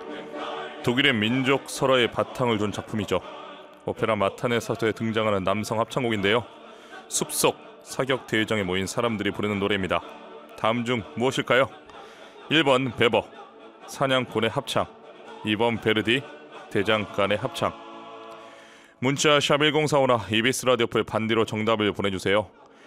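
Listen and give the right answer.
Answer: 1번: 베버, 사냥꾼의 합창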